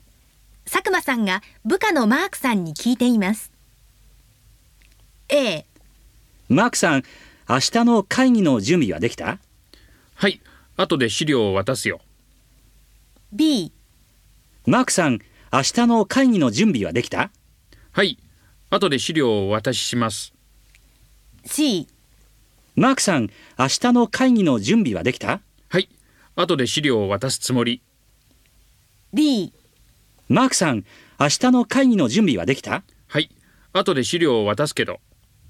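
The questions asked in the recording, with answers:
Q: マさんが部下のマークさんに聞いています。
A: B: はい、後で資料を渡しします。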